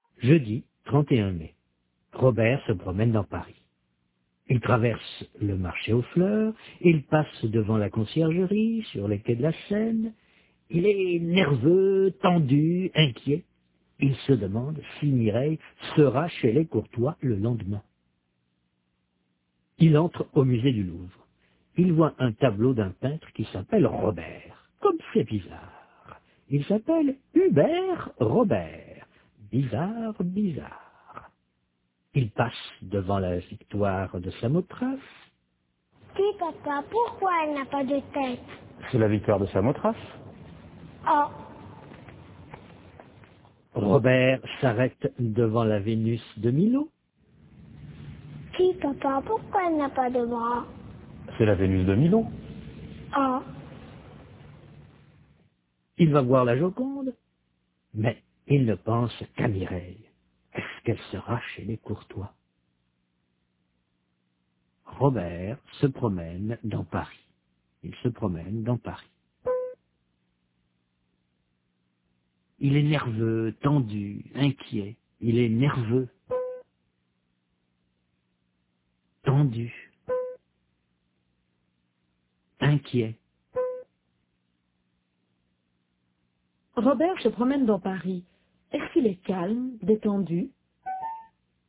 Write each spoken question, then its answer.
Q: Est-ce qu'il est calme, détendu?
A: Non, il est nerveux, tendu, inquiet.